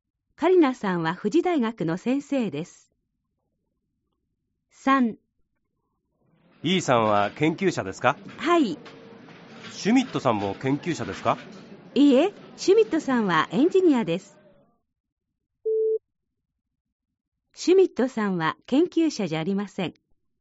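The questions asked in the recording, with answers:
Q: シュミットさんは研究者じゃありません。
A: ○ (正しい)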